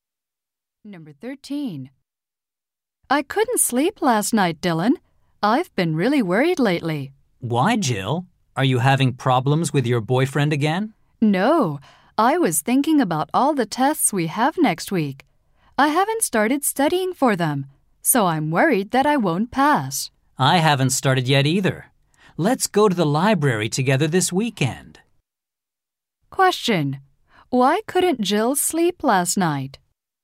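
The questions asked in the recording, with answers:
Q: Why couldn't Jill sleep last night?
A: She was worried about next week's tests.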